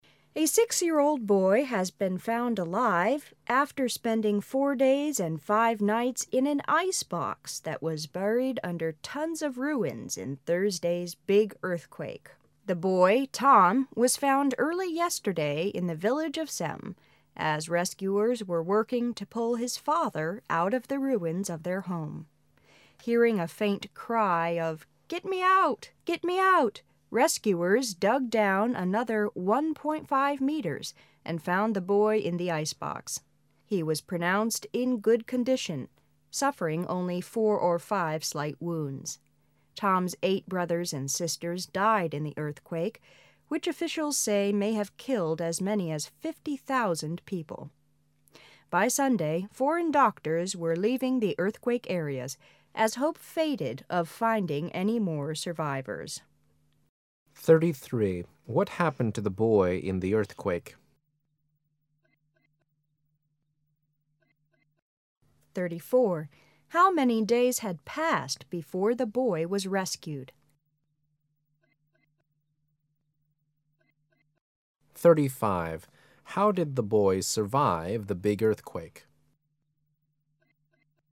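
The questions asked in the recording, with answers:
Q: What happened to the boy in the earthquake?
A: He was trapped in an icebox buried under ruins but was found alive

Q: How many days had passed before the boy was rescued?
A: 4 days (and 5 nights)

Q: How did the boy survive the big earthquake?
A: He was protected inside an icebox under the ruins

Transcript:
The boy Tom was found early yesterday in the village of Sem as rescuers were working to pull his father out of the ruins of their home. Hearing a faint cry of "Get me out. Get me out', rescuers dug down another one point five meters and found the boy in the icebox. He was pronounced in a good condition, suffering only four or five slight wounds. Tom' s eight brothers and sisters died in the earth quake which officials say may have killed as many as 50,000 people. By Sunday foreign doctors were leaving the earthquake areas as hope faded out finding any more survivors. 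What happened to the boy in earthquake?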